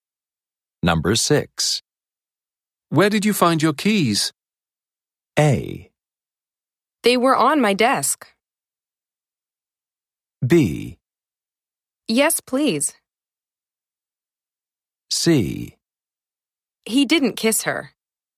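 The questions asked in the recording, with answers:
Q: Where did you find your keys?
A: A: They were on my desk.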